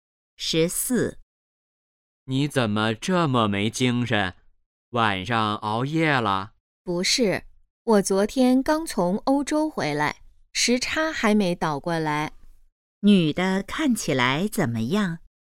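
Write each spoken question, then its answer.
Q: 女的看起来怎么样?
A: 没精神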